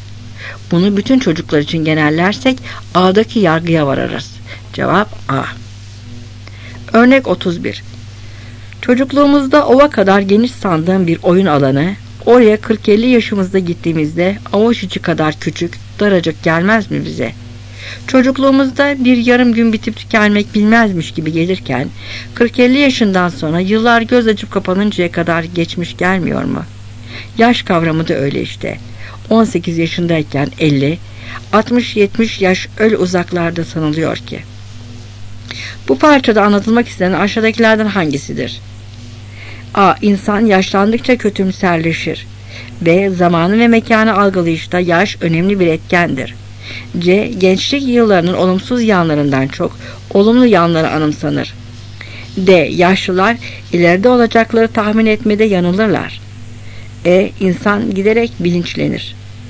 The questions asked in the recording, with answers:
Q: Bu parçada anlatılmak istenen aşağıdakilerden hangisidir?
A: Cevap B.